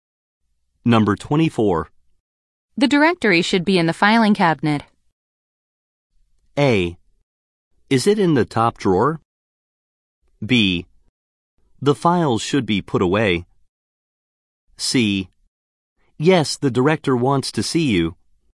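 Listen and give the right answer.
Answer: A: Is it in the top drawer?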